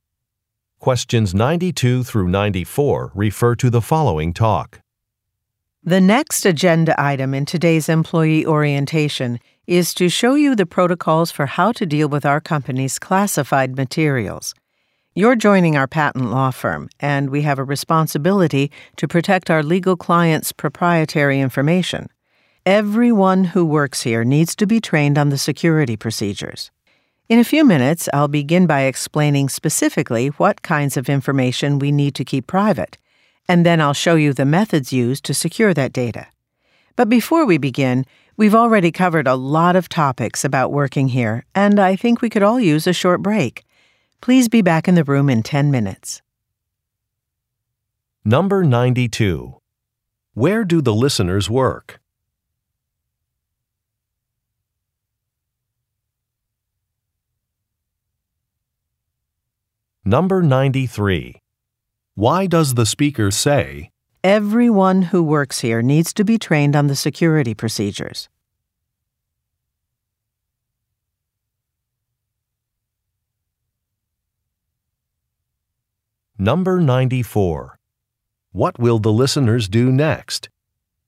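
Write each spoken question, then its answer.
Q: Where do the listeners work?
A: At a patent law firm

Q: What will the listeners do next?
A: Take a short break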